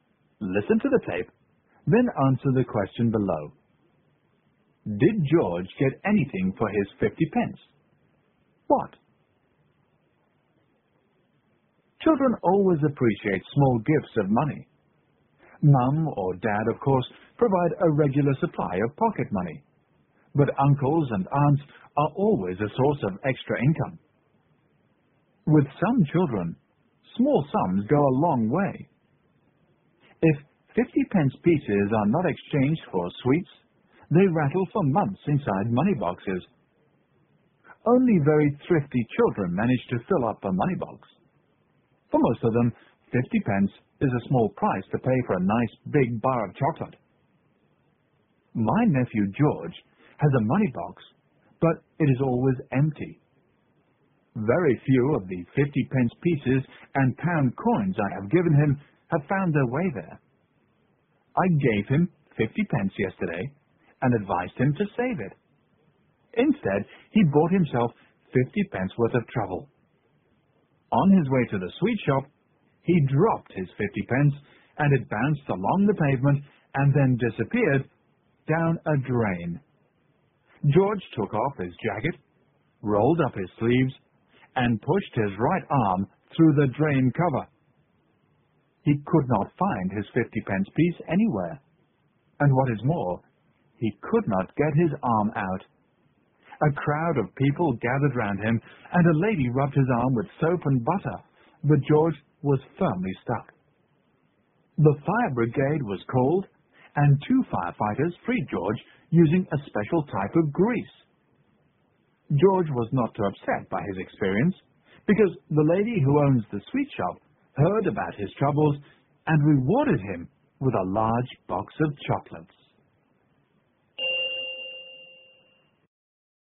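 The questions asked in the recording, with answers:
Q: Did George get anything for his 50 pence?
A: Yes, a large box of chocolates from the sweet shop owner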